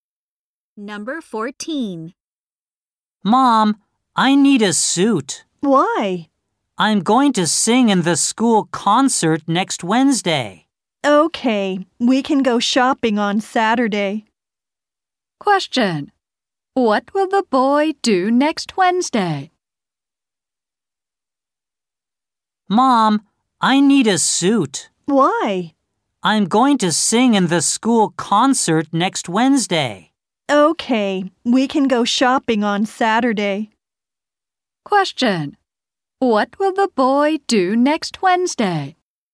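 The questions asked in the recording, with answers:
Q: Question: What will the boy do next Wednesday?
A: Sing in the school concert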